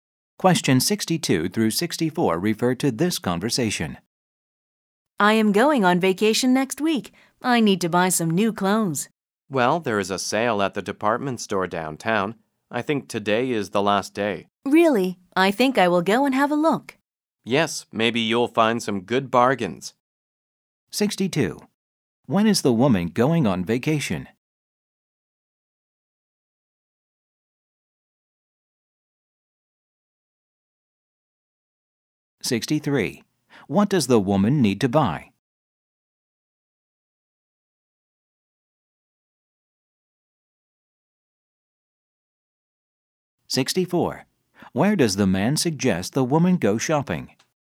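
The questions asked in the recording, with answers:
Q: When is the woman going on vacation?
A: Next week

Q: What does the woman need to buy?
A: New clothes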